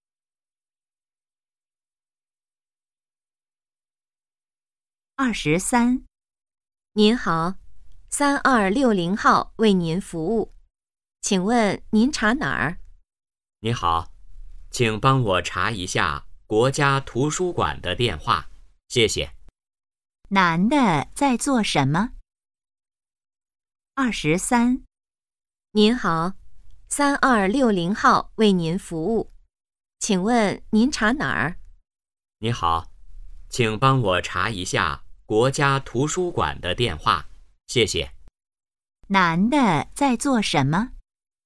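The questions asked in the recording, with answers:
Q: 男的在做什么?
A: 打电话查电话号码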